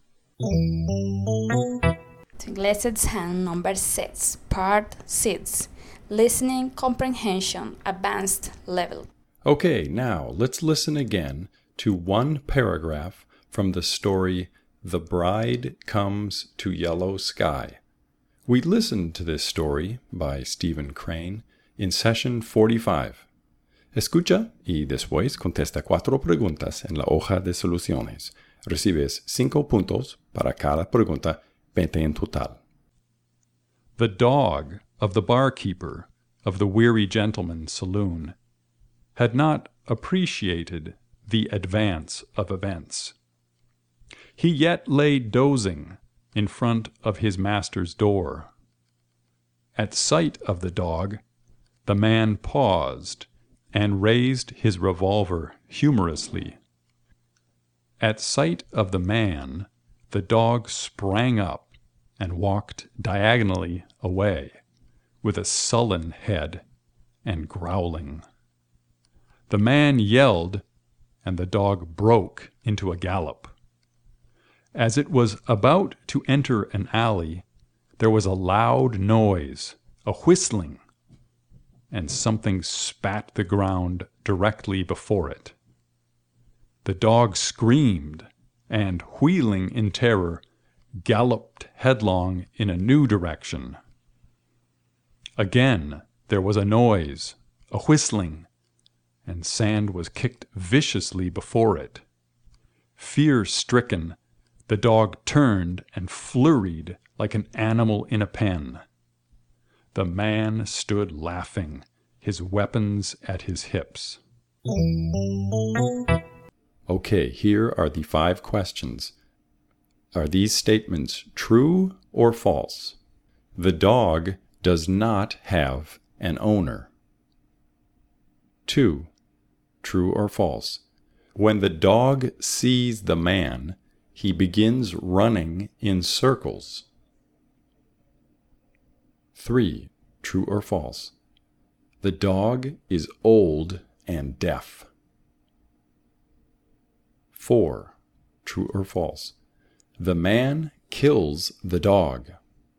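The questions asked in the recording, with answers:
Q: The dog does not have an owner.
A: False

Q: True or false? The man kills the dog.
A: False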